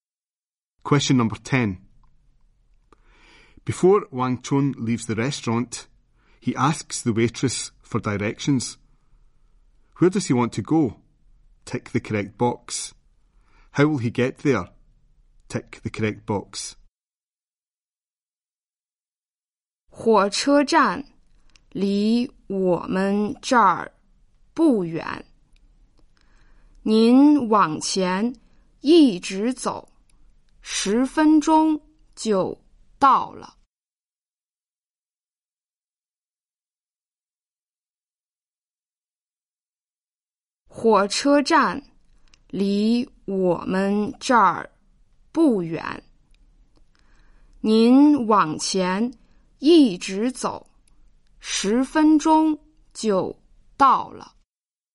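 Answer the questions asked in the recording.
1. The train station
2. On foot, walking straight ahead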